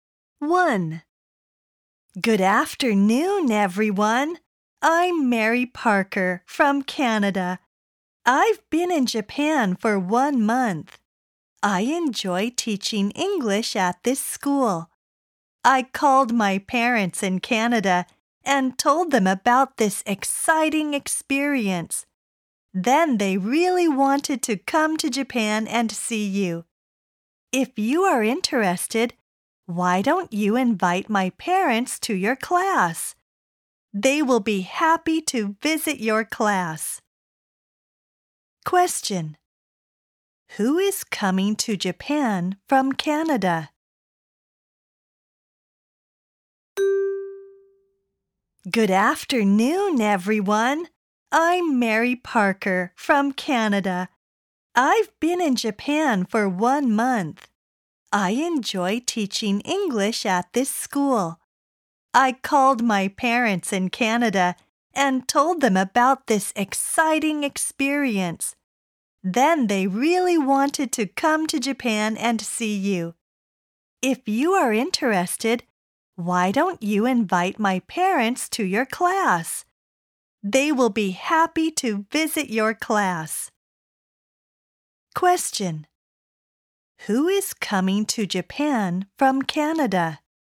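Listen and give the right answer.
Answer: Mary Parker's parents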